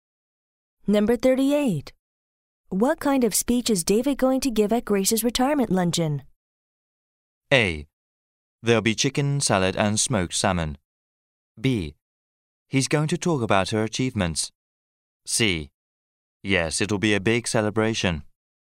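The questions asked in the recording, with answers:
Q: What kind of speech is David going to give at Grace's retirement luncheon?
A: B: He's going to talk about her achievements.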